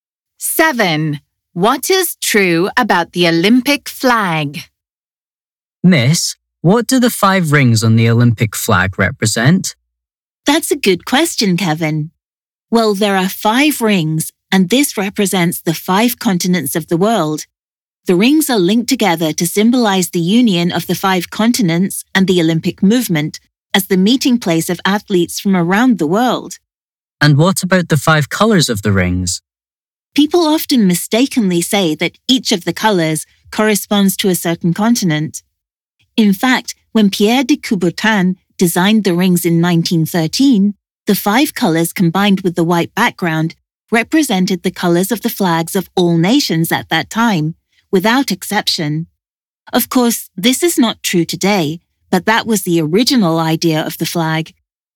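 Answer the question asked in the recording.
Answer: Originally, its colours and white background represented the colours of every nation's flag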